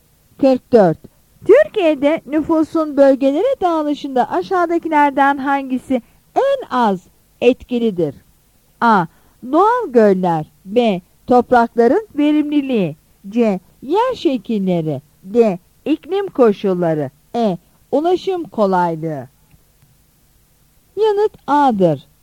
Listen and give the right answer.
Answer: Yanıt A'dır.